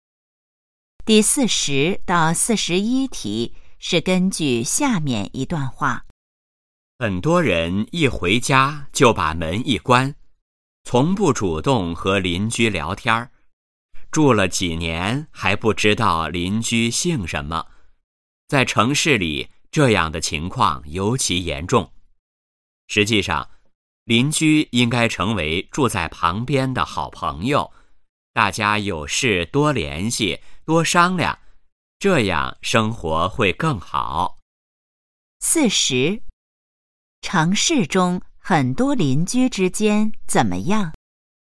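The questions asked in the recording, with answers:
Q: 城市中很多邻居之间怎么样?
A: 很少交流,互相不了解(住了几年还不知道邻居姓什么)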